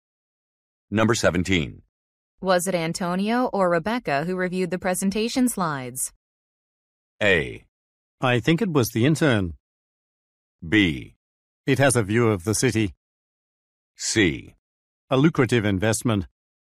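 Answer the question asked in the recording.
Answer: A: I think it was the intern.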